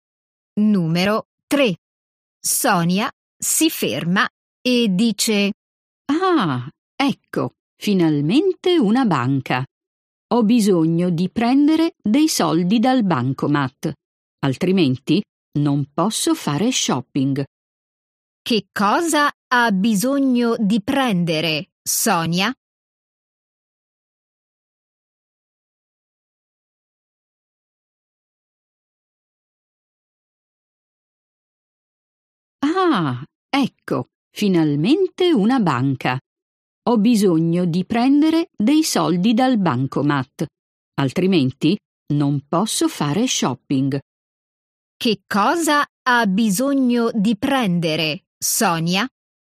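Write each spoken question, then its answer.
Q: Che cosa ha bisogno di prendere, Sonia?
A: dei soldi dal bancomat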